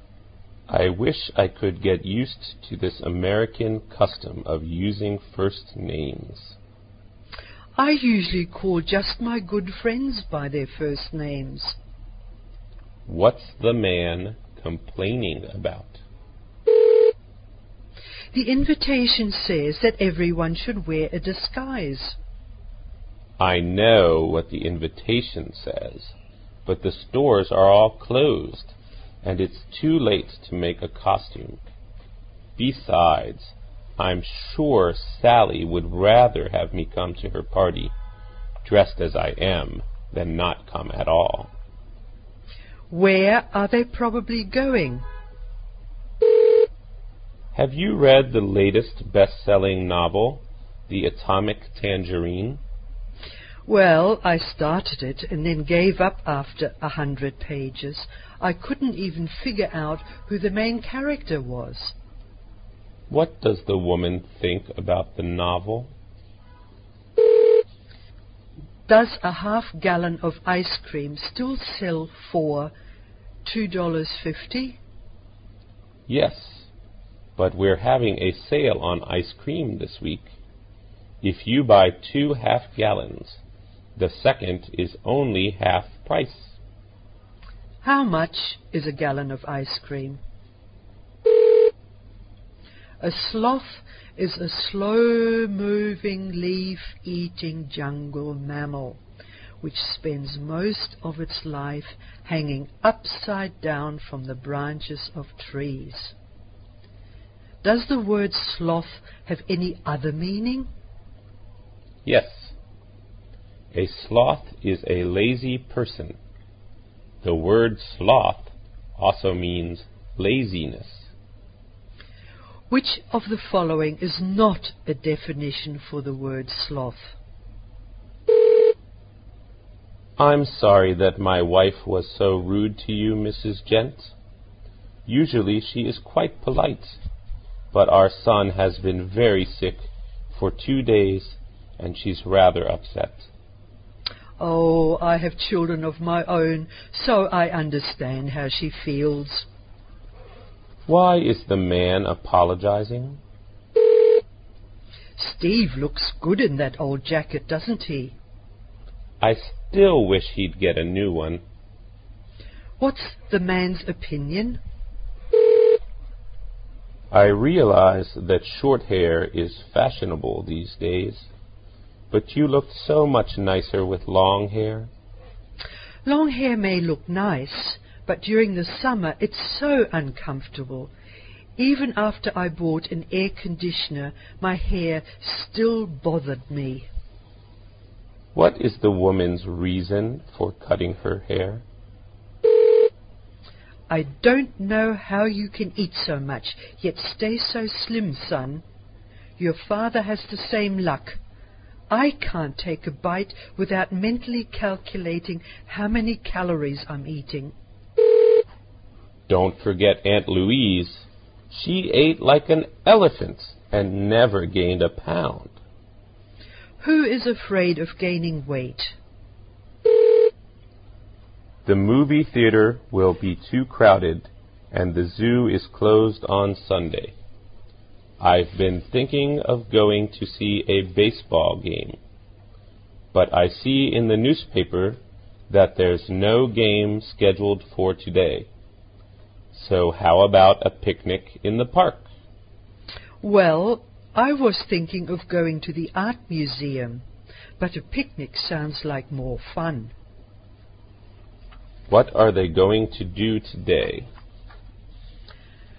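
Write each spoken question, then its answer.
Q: What's the man complaining about?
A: The American custom of using first names

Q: Where are they probably going?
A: To Sally's costume party

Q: What does the woman think about the novel?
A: It was confusing and she gave up on it

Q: How much is a gallon of ice cream?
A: $3.75

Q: Why is the man apologizing?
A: Because his wife was rude to Mrs. Gent

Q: What is the woman's reason for cutting her hair?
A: Long hair is uncomfortable in the summer

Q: Who is afraid of gaining weight?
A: The mother (the speaker talking to her son)

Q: What are they going to do today?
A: Have a picnic in the park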